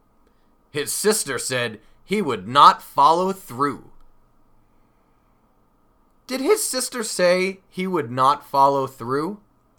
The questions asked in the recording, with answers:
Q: Did his sister say he would not follow through?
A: Yes, she did. His sister said he would not follow through.